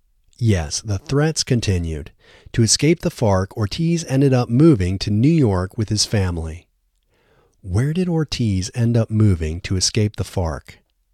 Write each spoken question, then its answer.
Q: Where did Ortiz end up moving to escape the FARC?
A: Ortiz ended up moving to New York to escape the FARC.